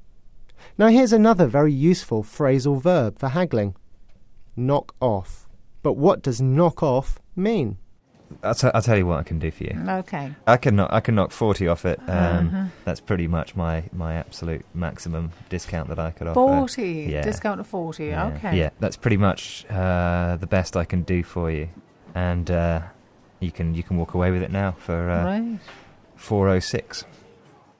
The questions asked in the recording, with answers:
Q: But what does knock off mean?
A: To knock some money off something means to reduce the price.